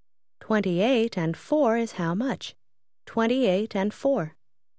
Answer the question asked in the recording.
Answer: 32.